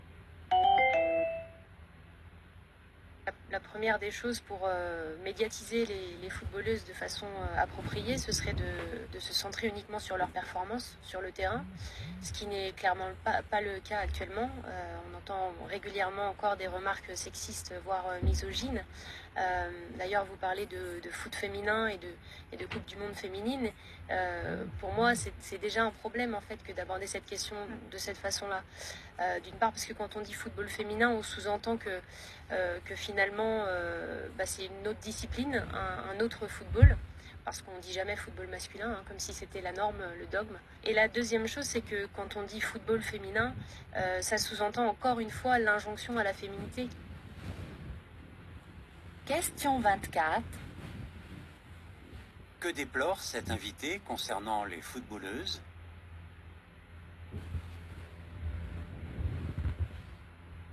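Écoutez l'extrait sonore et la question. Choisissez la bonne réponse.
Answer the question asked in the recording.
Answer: Qu'on ne se concentre pas sur leurs performances sportives et les remarques sexistes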